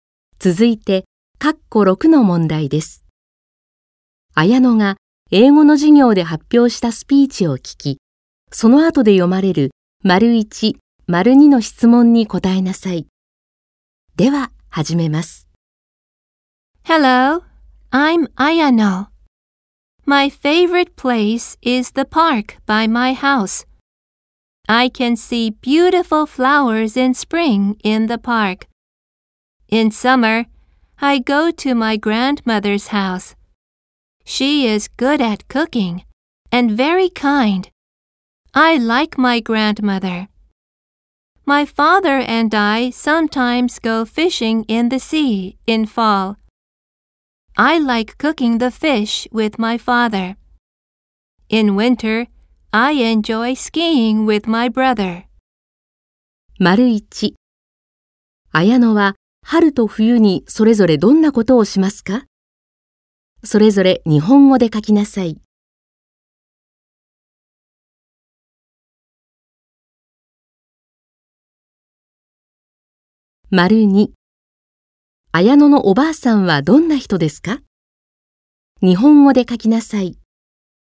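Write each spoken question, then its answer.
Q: Ayano は春と冬にそれぞれどんなことをしますか?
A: 春は公園で美しい花を見る、冬は兄(弟)とスキーを楽しむ

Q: 綾野のおばあさんはどんな人ですか?日本語で書きなさい。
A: 料理が得意でとても優しい人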